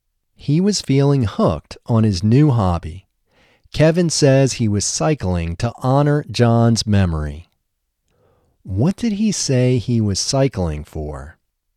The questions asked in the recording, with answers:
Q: What did he say he was cycling for?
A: He said he was cycling to honor John's memory.